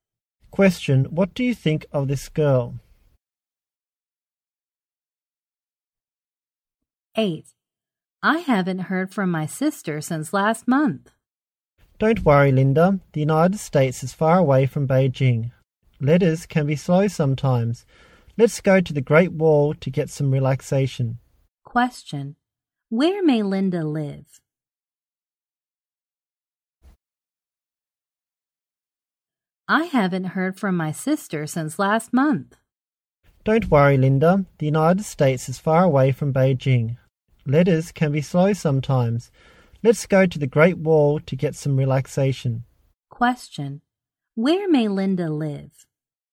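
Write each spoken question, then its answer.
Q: Where may Linda live?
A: In Beijing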